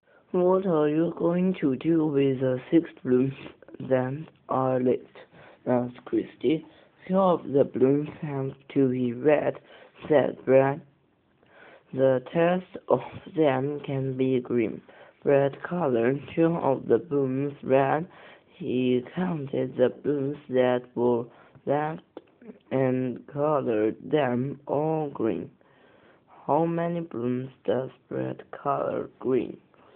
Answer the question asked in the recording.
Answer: Brad colors four blooms green, because six take away two, leaves four.